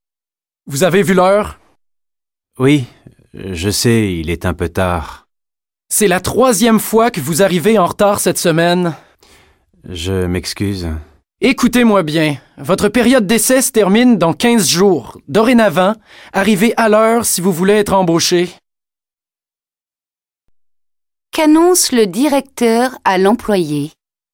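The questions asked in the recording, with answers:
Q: Qu'annonce le directeur à l'employé?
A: Sa période d'essai se termine dans 15 jours ; il doit arriver à l'heure s'il veut être embauché.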